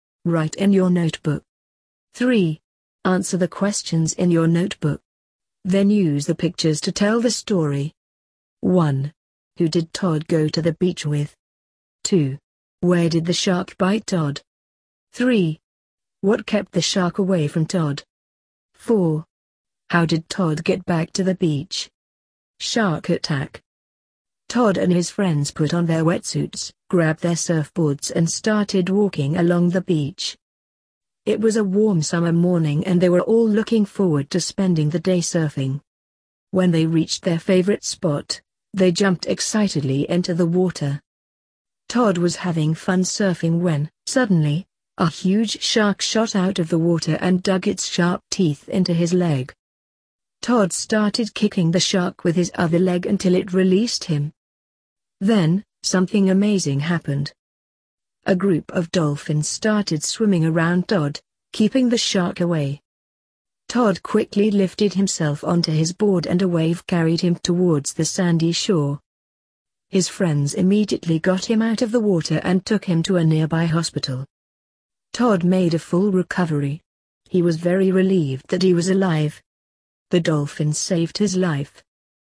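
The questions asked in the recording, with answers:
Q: Who did Todd go to the beach with?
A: His friends

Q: Where did the shark bite Todd?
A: In his leg

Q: What kept the shark away from Todd?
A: A group of dolphins

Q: How did Todd get back to the beach?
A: He got onto his board and a wave carried him to the shore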